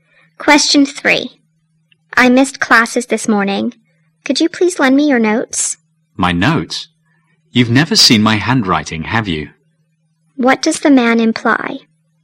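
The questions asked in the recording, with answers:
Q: What does the man imply?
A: His handwriting is hard to read.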